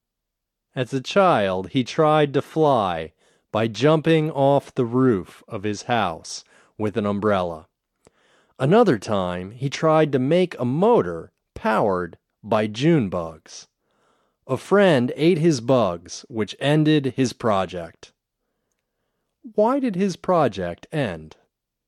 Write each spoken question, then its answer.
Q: Why did his project end?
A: His project ended because his friend ate his June bugs.